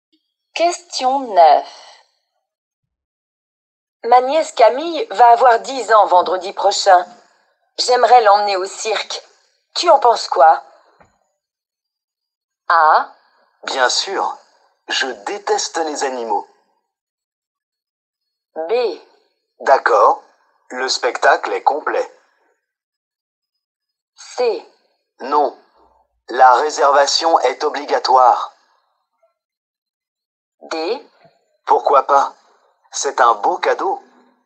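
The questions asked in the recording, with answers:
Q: Tu en penses quoi?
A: D: Pourquoi pas? C'est un beau cadeau.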